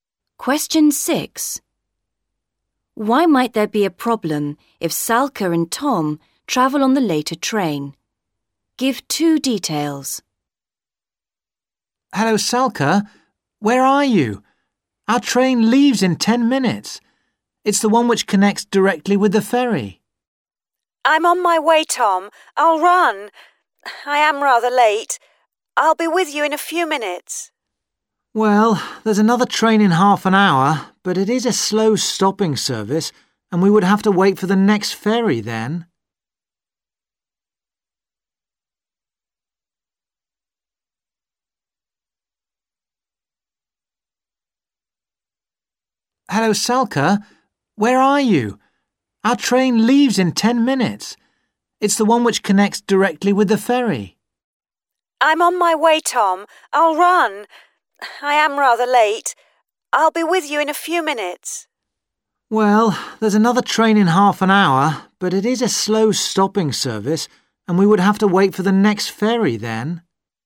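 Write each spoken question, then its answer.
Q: Why might there be a problem if Salka and Tom travel on the later train?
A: It is a slow stopping train, and they would have to wait for the next ferry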